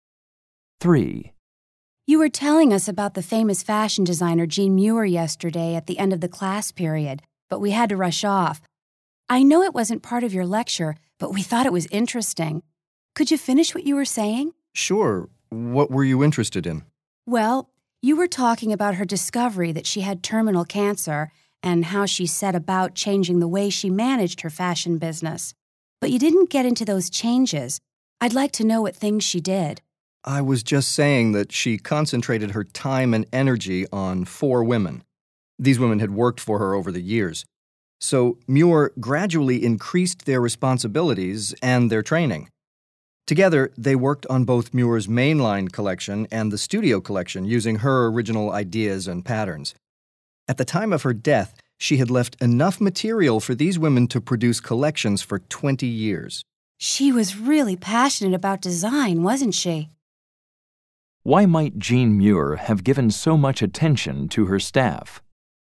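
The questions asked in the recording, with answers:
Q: Why might Jean Muir have given so much attention to her staff?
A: So they could carry on her business after her death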